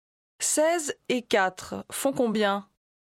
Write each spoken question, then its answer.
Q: 16 et 4 font combien?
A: 20.